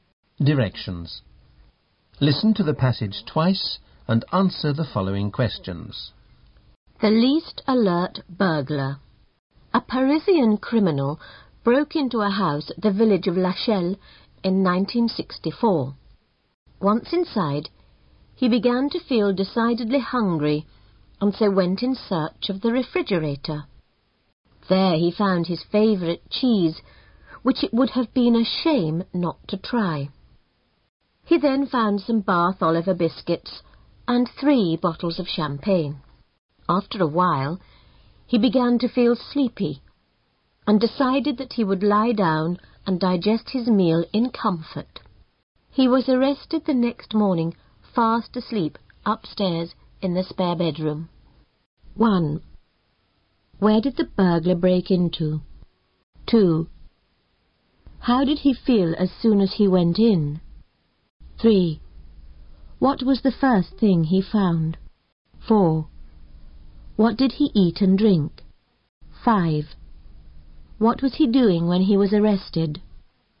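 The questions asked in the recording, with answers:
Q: Where did the burglar break into?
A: A house in the village of Lachelle.

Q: How did he feel as soon as he went in?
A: Very hungry.

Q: What was the first thing he found?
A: His favourite cheese.

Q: What did he eat and drink?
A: Cheese, Bath Oliver biscuits and 3 bottles of champagne.

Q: What was he doing when he was arrested?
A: Sleeping upstairs in the spare bedroom.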